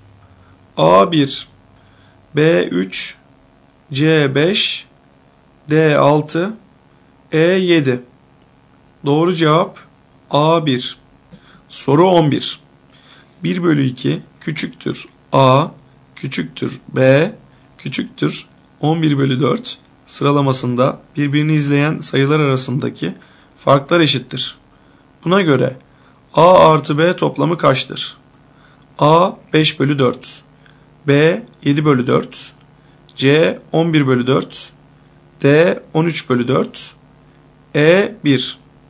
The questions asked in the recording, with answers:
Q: Buna göre A artı B toplamı kaçtır?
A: Doğru cevap D 13 bölü 4.